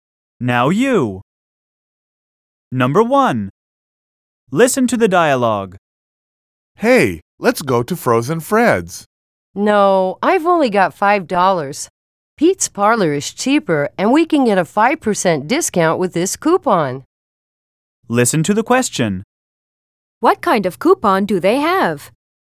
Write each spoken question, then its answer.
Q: What kind of coupon do they have?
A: According to the woman, they can get a 5% discount at Pete's Parlor with the coupon they have.